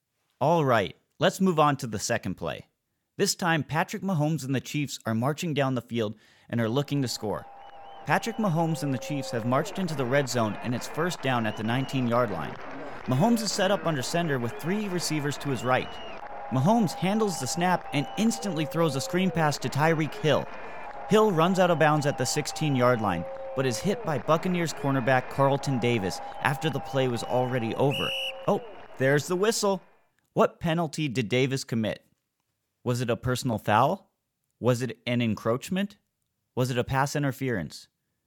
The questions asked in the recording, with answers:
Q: What penalty did Davis commit?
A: If you said personal foul, you are correct.